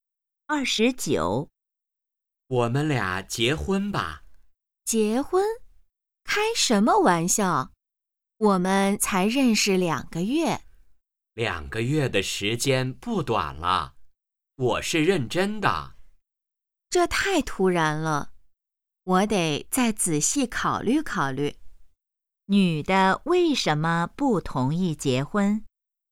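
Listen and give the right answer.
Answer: 认识时间太短(才两个月),太突然了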